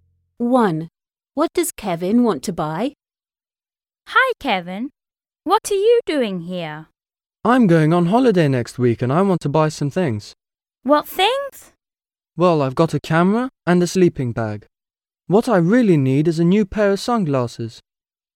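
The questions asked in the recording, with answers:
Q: What does Kevin want to buy?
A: a new pair of sunglasses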